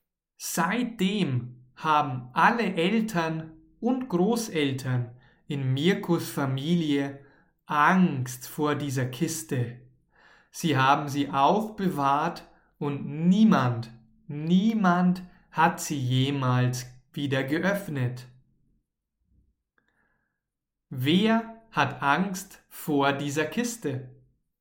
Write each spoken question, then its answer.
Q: Wer hat Angst vor dieser Kiste.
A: Seine Eltern und Großeltern, die ganze Familie hat Angst vor dieser Kiste.